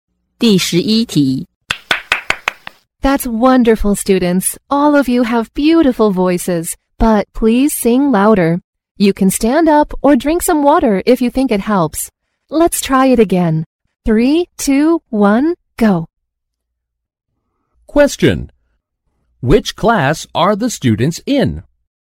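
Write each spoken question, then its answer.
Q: Which class are the students in?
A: Music class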